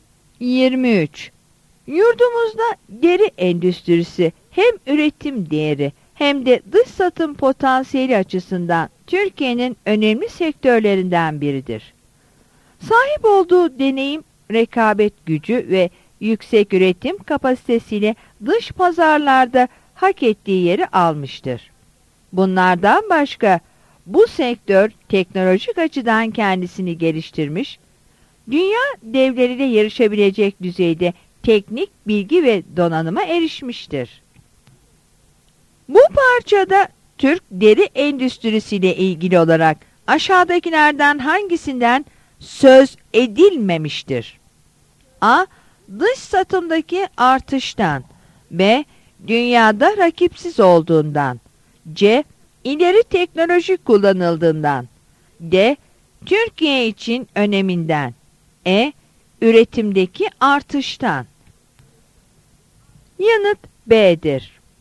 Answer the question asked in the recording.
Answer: Yanıt B'dir.